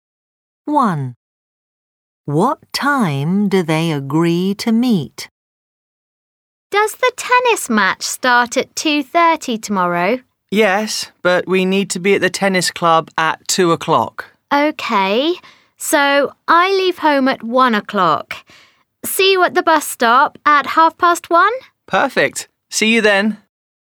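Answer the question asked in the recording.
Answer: 1:30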